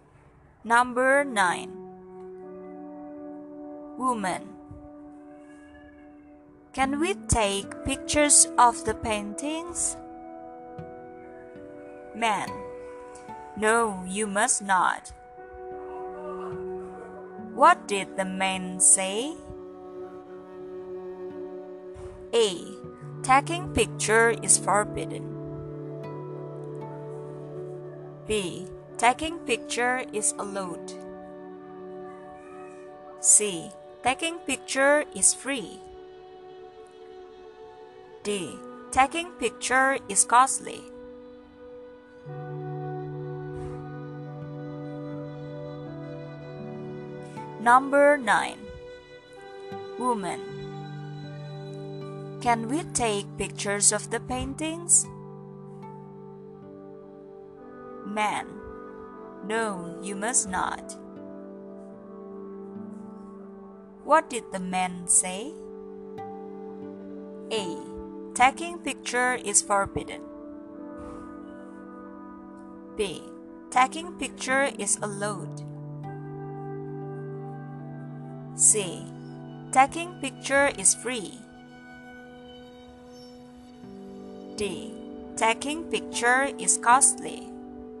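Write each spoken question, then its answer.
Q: What did the man say?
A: A: Taking picture is forbidden.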